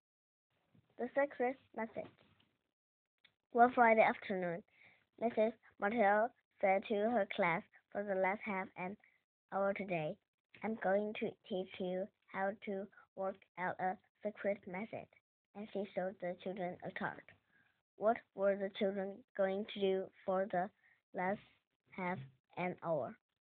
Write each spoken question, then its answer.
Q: What were the children going to do for the last half an hour?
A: They were going to learn how to work out a secret message.